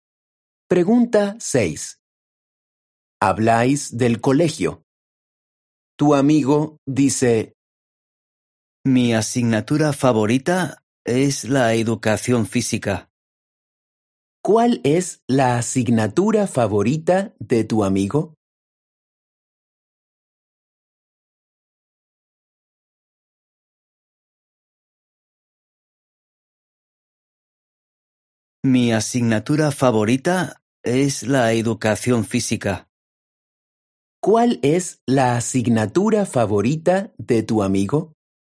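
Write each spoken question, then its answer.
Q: ¿Cuál es la asignatura favorita de tu amigo?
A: la educación física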